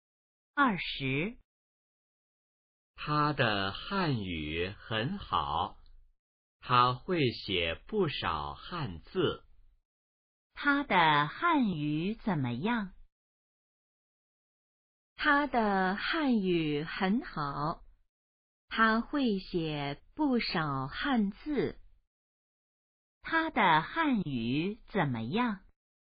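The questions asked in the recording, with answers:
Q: 他的汉语怎么样?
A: 很好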